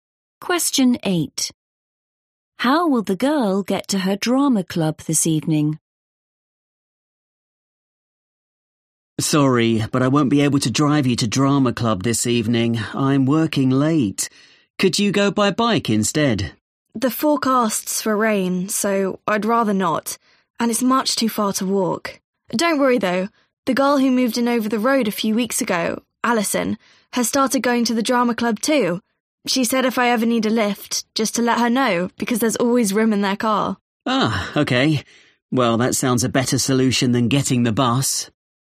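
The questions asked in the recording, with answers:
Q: How will the girl get to her drama club this evening?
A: She'll get a lift in Alison's car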